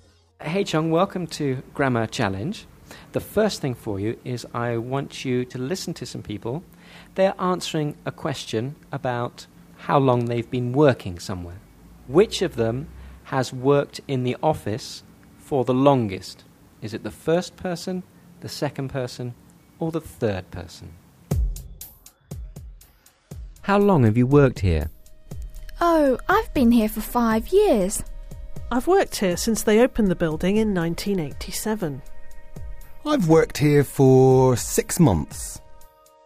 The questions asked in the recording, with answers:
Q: Which of them has worked in the office for the longest?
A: The second person, yes. Yes, they worked there since 1987.